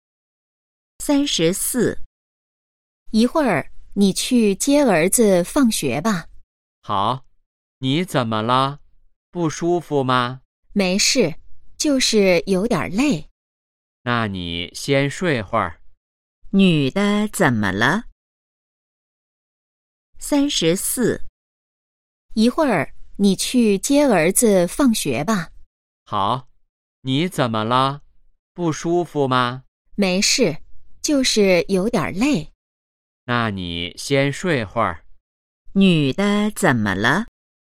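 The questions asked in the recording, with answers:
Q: 女的怎么了?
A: 有点累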